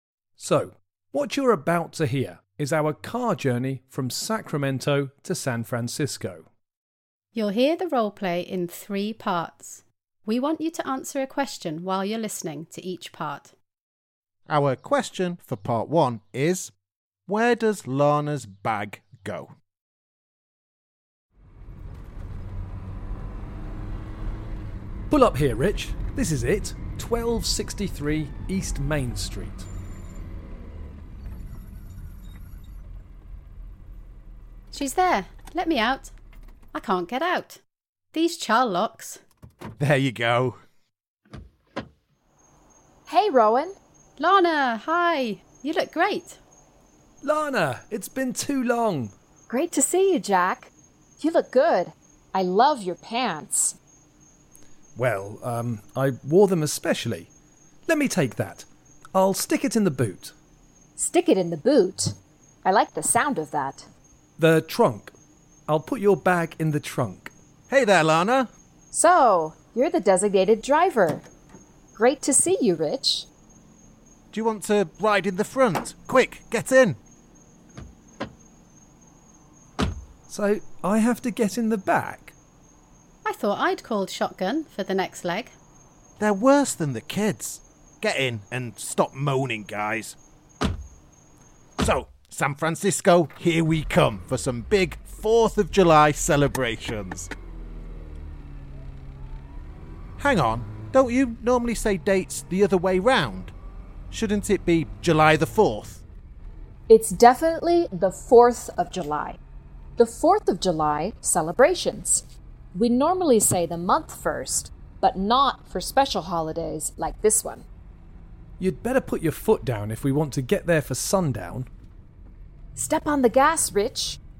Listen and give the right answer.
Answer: The answer is in the boot of the car.